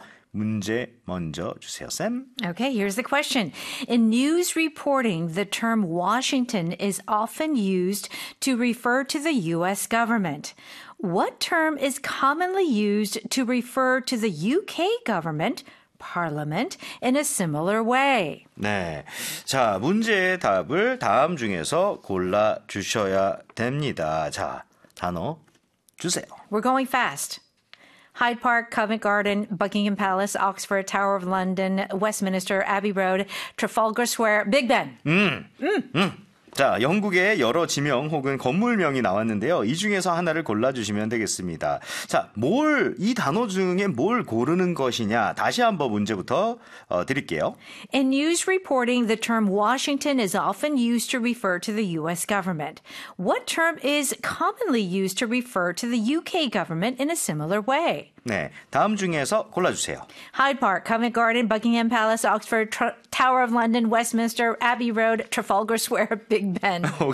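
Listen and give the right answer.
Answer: Westminster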